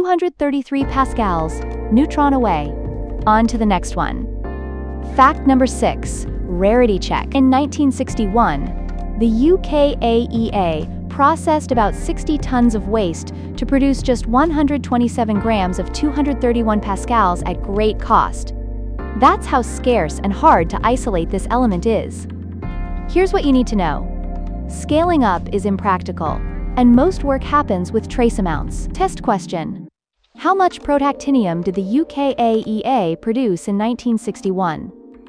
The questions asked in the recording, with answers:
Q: How much protactinium did the UK AEA produce in 1961?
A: Correct answer, 127 grams.